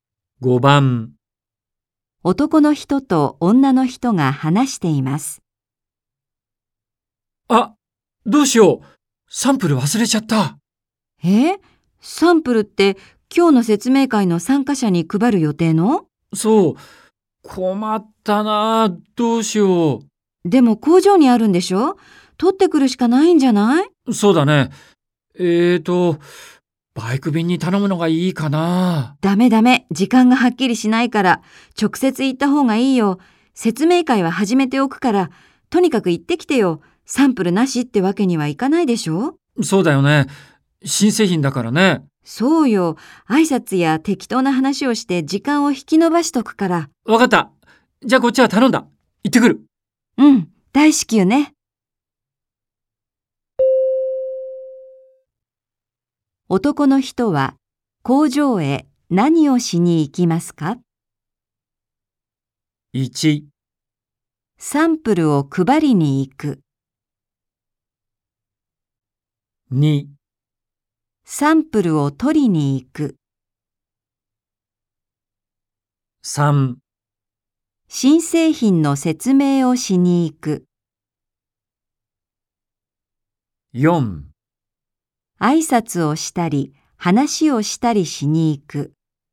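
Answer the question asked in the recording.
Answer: 2: サンプルを取りに行く。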